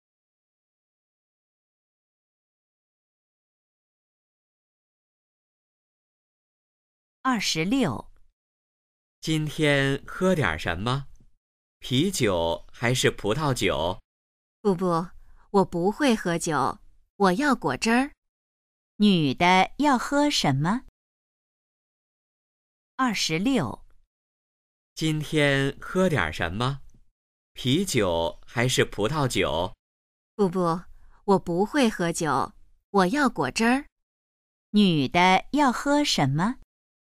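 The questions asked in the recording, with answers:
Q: 女的要喝什么?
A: 果汁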